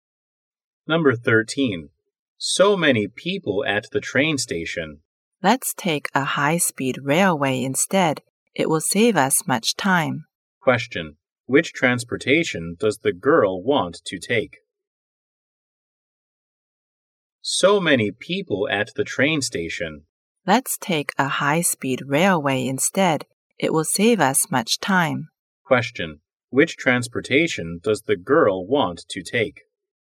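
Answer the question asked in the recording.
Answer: The high-speed railway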